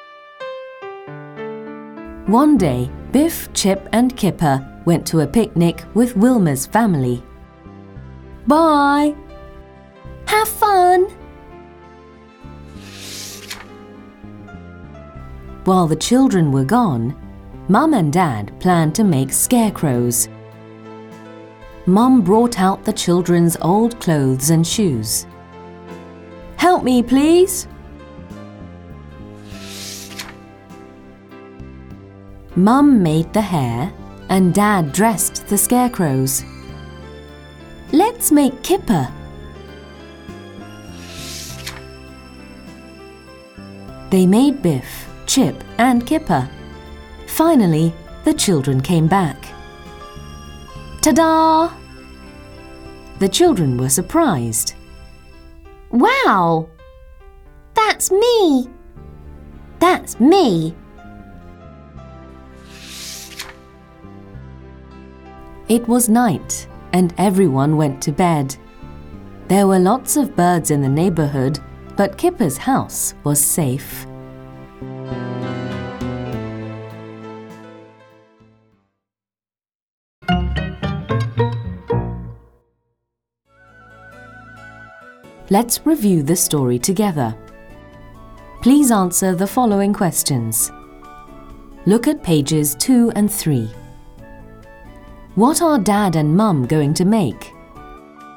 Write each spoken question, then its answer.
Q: Look at pages 2 and 3. What are Dad and Mum going to make?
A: They are going to make scarecrows.